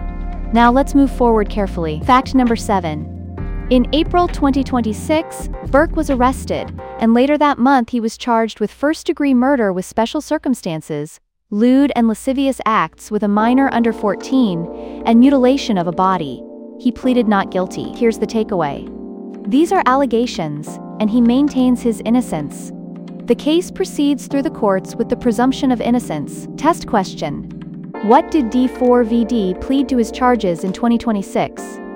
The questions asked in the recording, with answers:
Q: What did D4VD plead to his charges in 2026?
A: Not guilty.